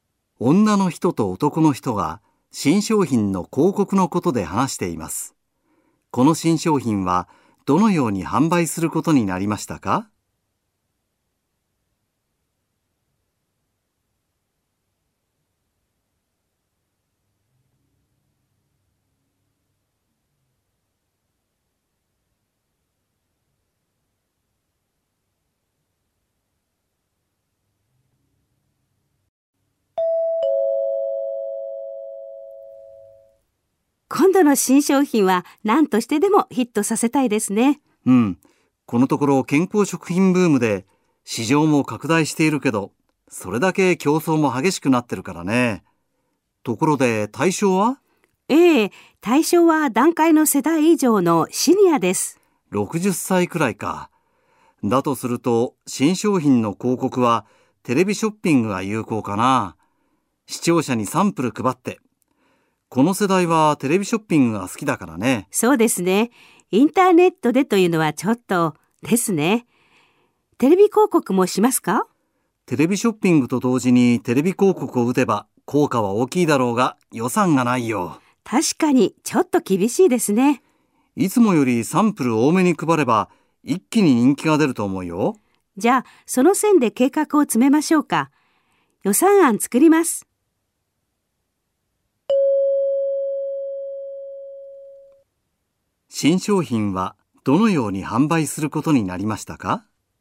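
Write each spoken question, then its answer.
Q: 新商品はどのように販売することになりましたか?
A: テレビショッピングで、サンプルを多めに配って販売する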